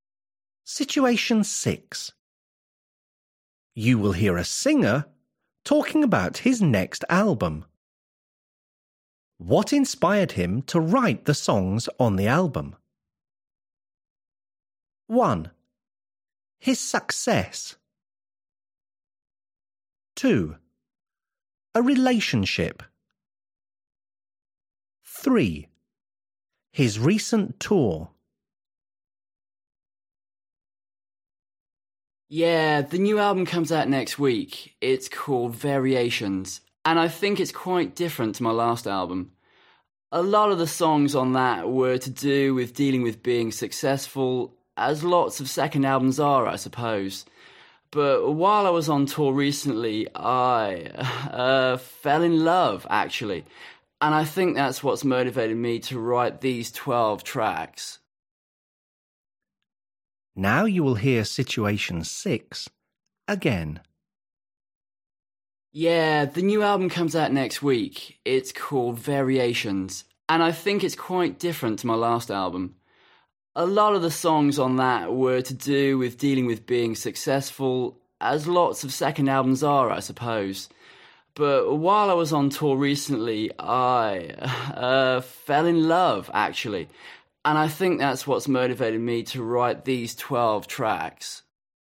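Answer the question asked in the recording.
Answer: 2: A relationship.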